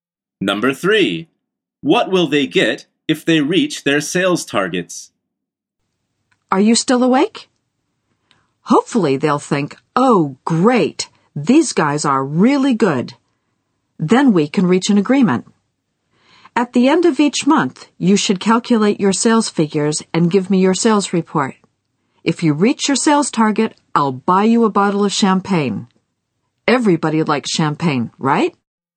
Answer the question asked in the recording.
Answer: The answer is a bottle of champagne.